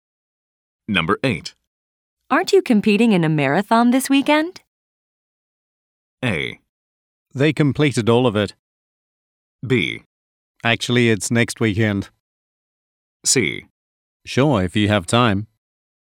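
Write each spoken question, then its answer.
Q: Aren't you competing in a marathon this weekend?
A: B: Actually, it's next weekend.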